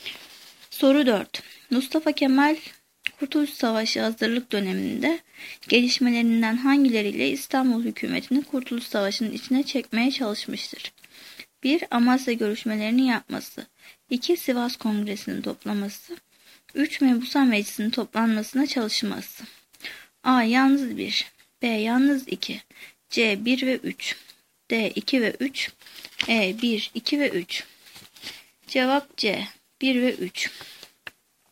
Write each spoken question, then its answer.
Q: Mustafa Kemal Kurtuluş Savaşı hazırlık döneminde gelişmelerinden hangileriyle İstanbul hükümetini Kurtuluş Savaşı'nın içine çekmeye çalışmıştır?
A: Cevap C. 1 ve 3.